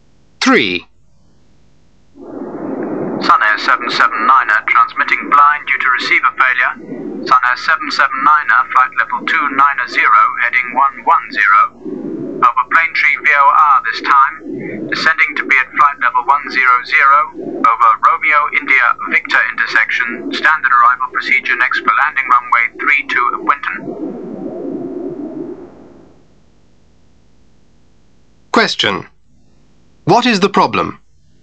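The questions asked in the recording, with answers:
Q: What is the problem?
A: Receiver failure; the pilot is transmitting blind.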